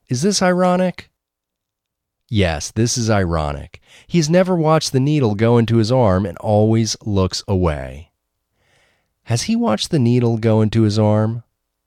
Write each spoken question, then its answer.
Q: Has he watched the needle go into his arm?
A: No, he has never watched the needle go into his arm.